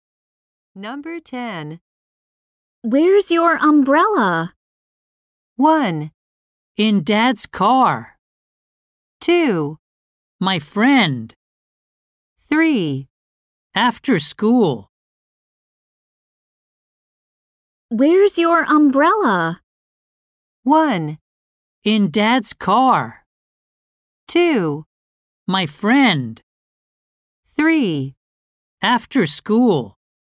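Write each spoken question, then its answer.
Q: Where's your umbrella?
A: 1: In Dad's car.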